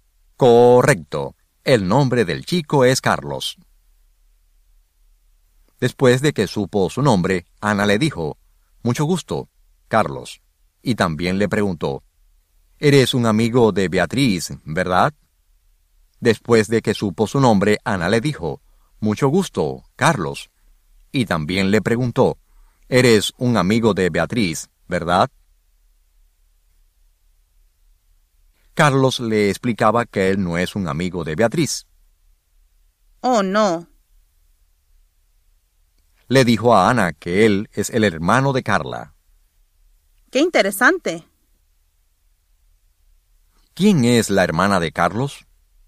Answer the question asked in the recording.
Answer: Carla es la hermana de Carlos.